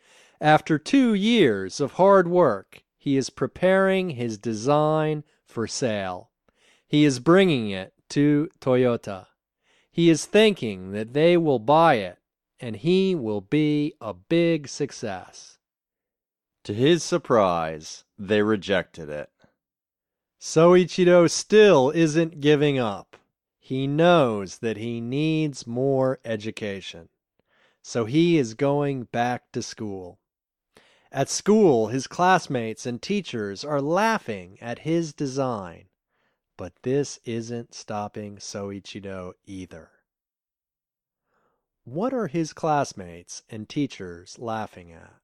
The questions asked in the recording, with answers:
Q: What are his classmates and teachers laughing at?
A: His classmates and teachers are laughing at his design.